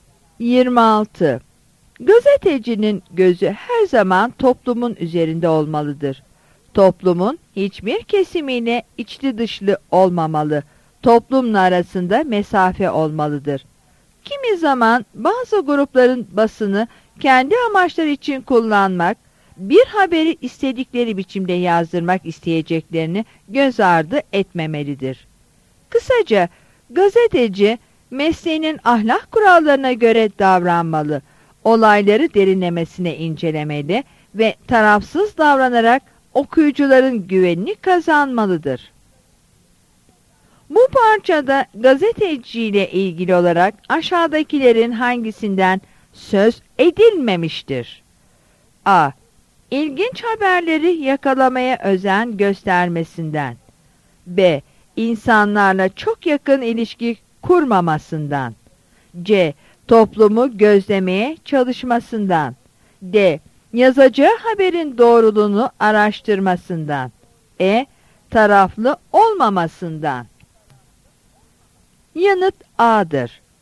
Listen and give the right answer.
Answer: Yanıt A'dır.